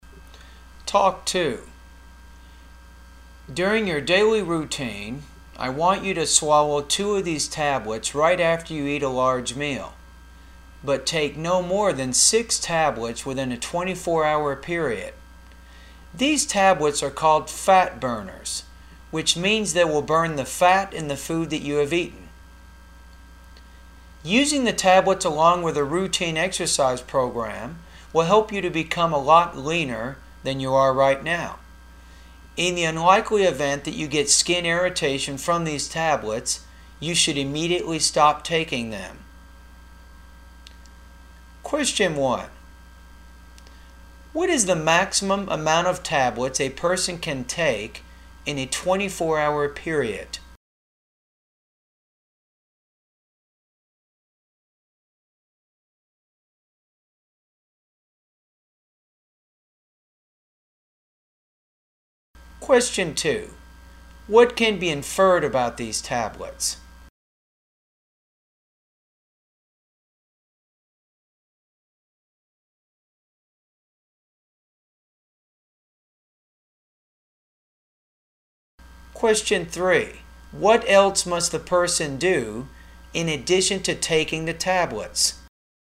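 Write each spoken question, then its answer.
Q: What is the maximum amount of tablets a person can take in a 24-hour period?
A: 6 tablets

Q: What else must the person do in addition to taking the tablets?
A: Follow a routine exercise program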